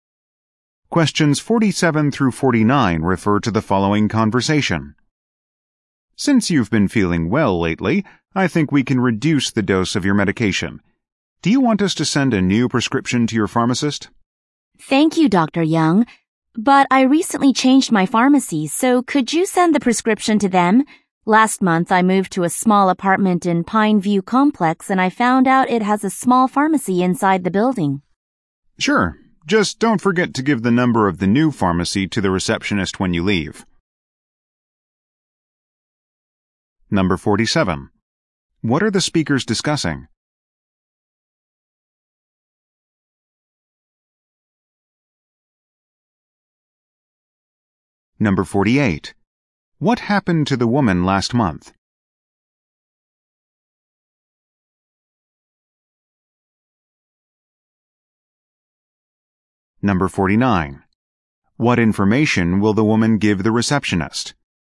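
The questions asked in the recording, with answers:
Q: What are the speakers discussing?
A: A change to her medication prescription

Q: What happened to the woman last month?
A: She moved to a new apartment

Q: What information will the woman give the receptionist?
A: The new pharmacy's phone number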